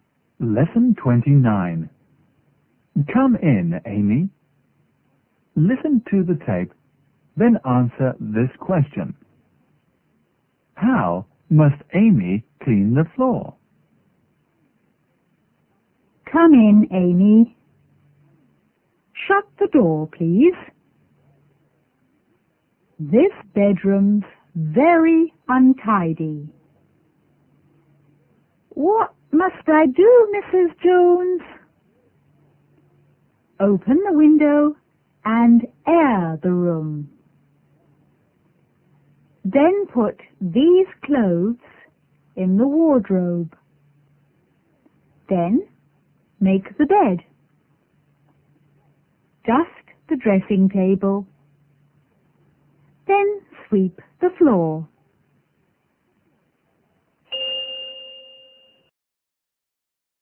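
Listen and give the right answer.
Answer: She must sweep it.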